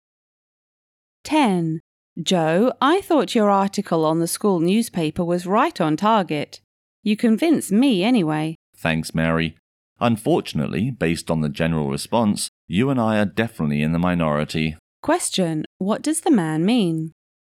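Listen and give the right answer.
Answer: Most people disagree with his article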